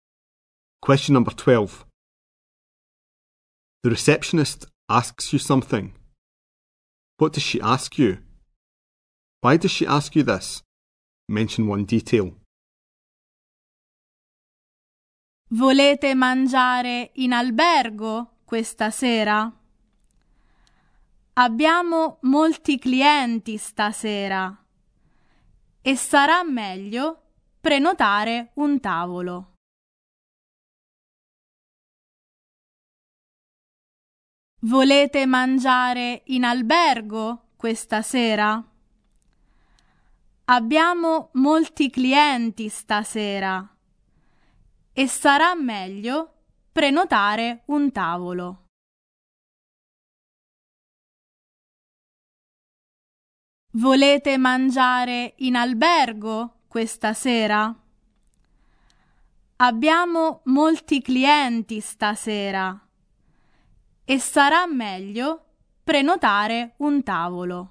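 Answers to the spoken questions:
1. If you want to eat in the hotel this evening
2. There are many guests tonight so it's better to book a table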